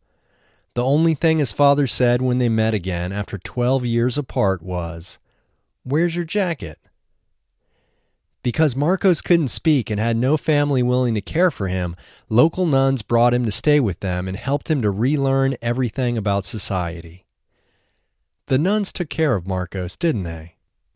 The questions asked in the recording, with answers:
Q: The nuns took care of Marcos, didn't they?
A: Yes, the nuns took care of him.